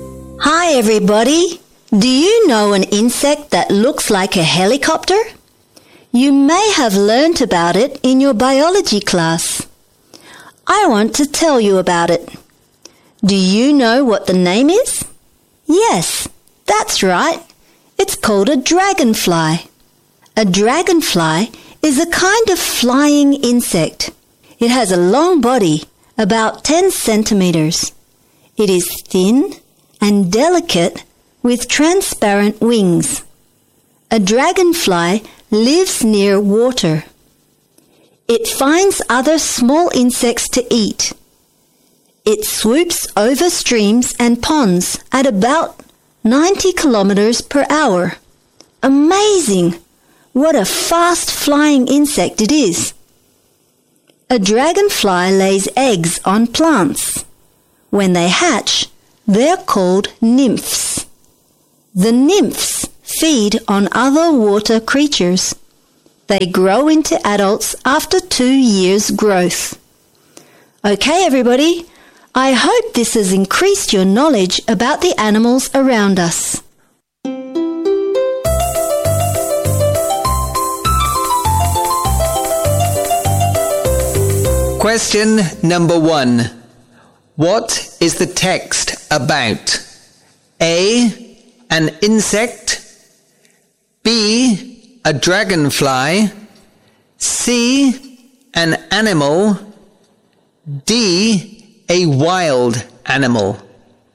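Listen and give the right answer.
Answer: B: A dragonfly.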